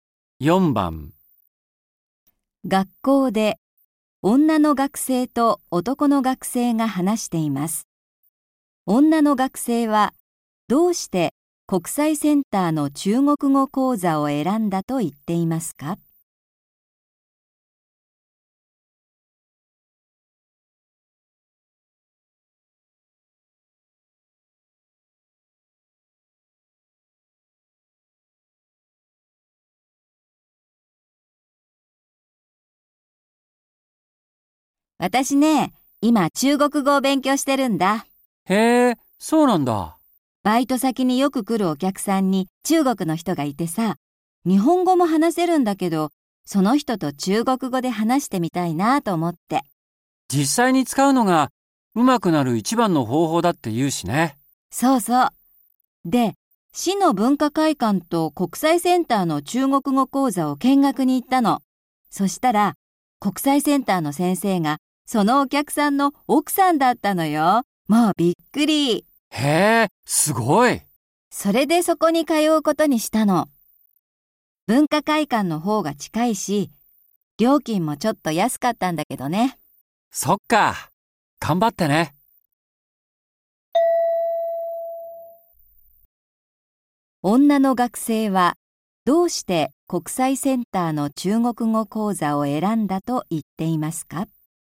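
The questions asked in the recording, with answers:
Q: 女の学生はどうして国際センターの中国語講座を選んだと言っていますか?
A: 先生がバイト先によく来るお客さんの奥さんだったから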